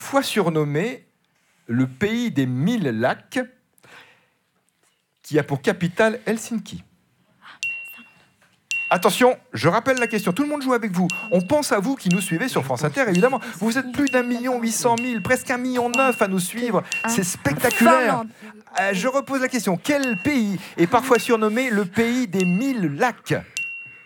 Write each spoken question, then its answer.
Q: Quel pays est parfois surnommé le pays des mille lacs ?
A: La Finlande.